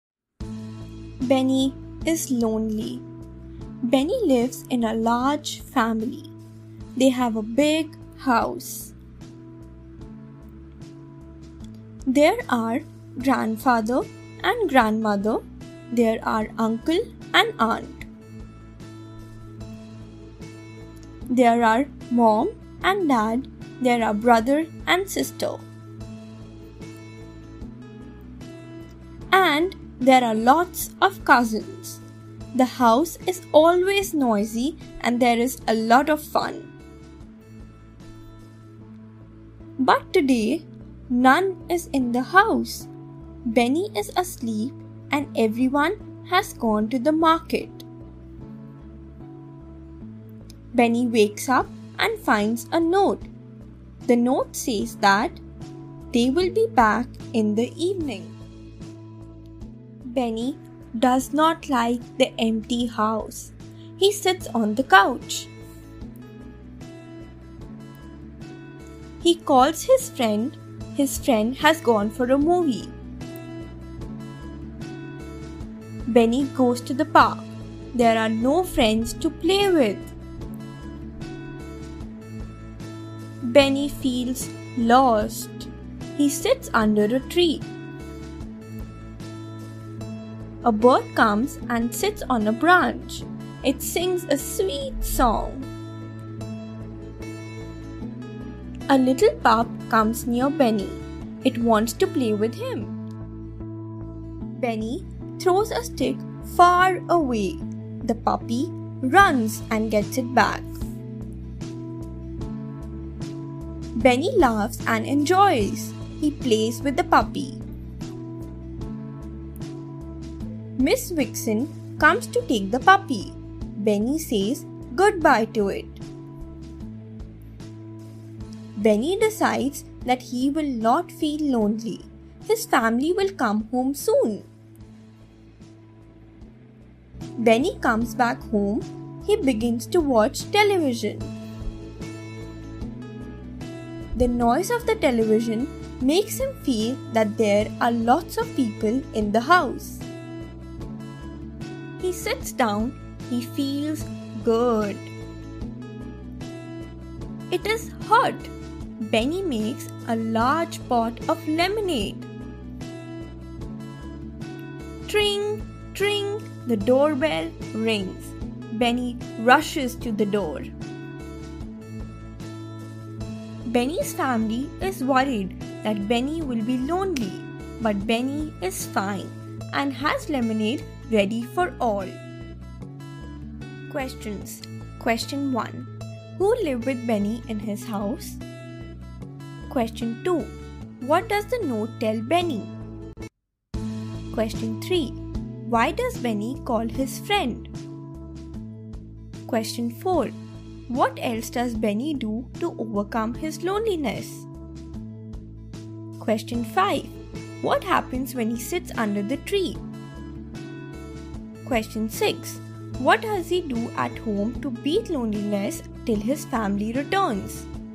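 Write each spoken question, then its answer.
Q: Who lived with Benny in his house?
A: His large family: grandparents, uncle and aunt, mom and dad, brother and sister, and lots of cousins

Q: What does the note tell Benny?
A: That they will be back in the evening

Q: what happens when he sits under the tree?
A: A bird sings a sweet song and a little pup comes to play with him

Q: What does he do at home to beat loneliness till his family returns?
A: He watches television and makes a large pot of lemonade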